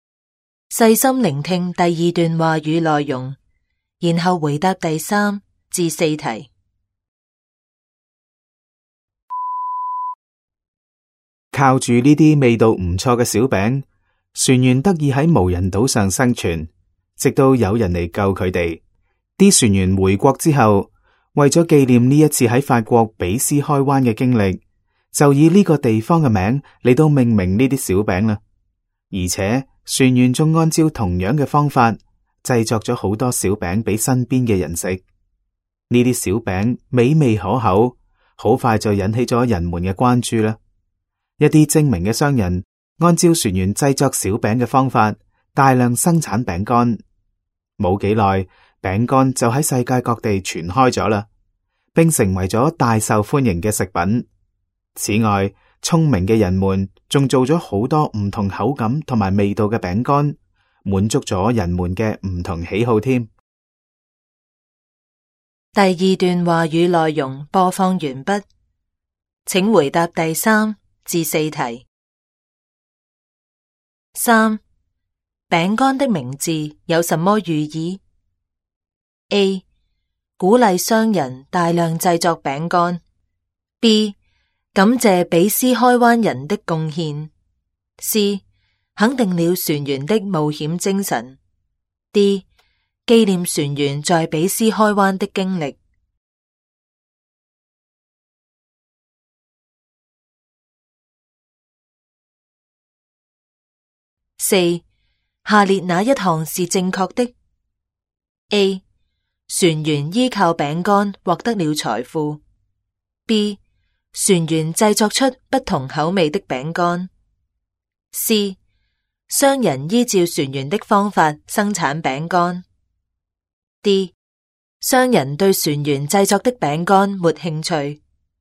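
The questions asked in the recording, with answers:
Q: 饼干的名字有什么寓意?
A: D: 纪念船员在比斯开湾的经历。

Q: 下列哪一项是正确的?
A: C: 商人依照船员的方法生产饼干。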